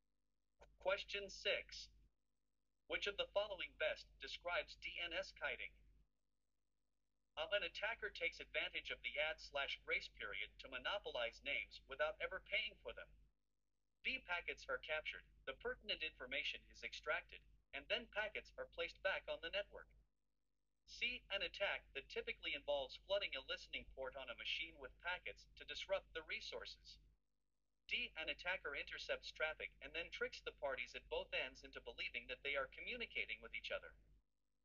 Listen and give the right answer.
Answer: The correct answer is A.